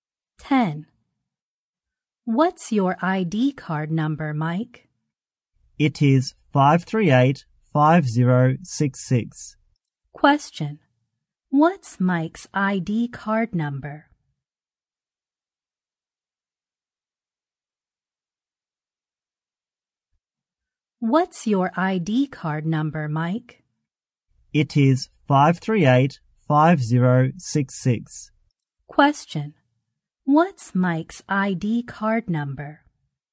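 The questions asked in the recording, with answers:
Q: What's Mike's ID card number?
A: 538-5066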